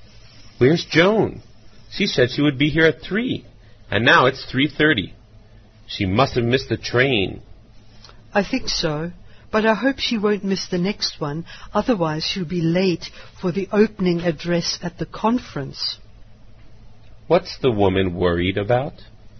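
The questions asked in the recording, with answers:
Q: What's the woman worried about?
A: Joan will be late for the opening address at the conference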